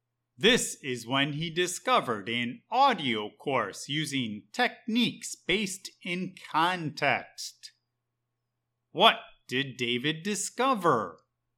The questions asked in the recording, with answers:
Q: What did David discover?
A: An audio course that uses techniques based in context.